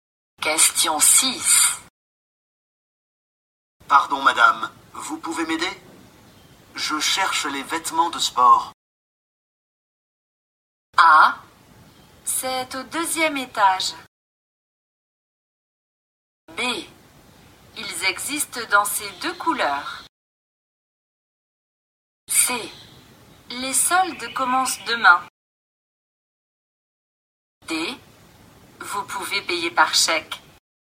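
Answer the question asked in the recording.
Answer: A: C'est au deuxième étage.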